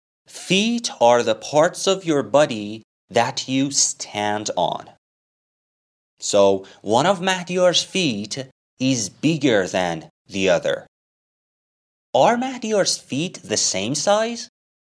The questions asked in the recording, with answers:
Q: Are Mahdiyar's feet the same size?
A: No. One of them is bigger than the other.